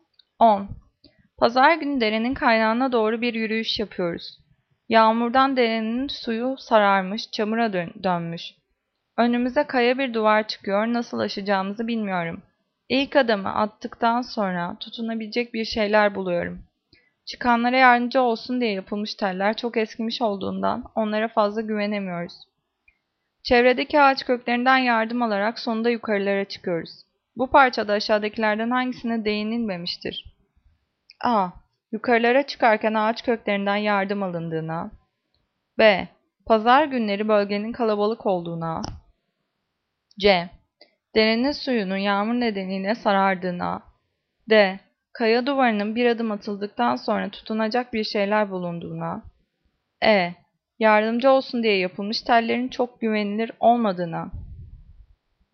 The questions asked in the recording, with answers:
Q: Bu parçada aşağıdakilerden hangisine değinilmemiştir?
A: Cevap B. Pazar günleri bölgenin kalabalık olduğuna.